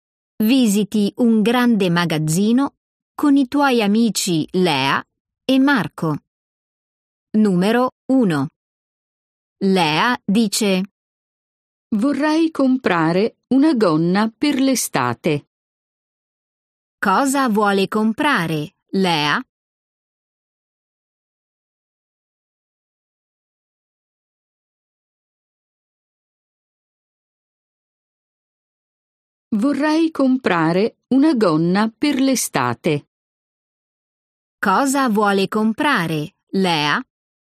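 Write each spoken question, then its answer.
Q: Cosa vuole comprare, Lea?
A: una gonna per l'estate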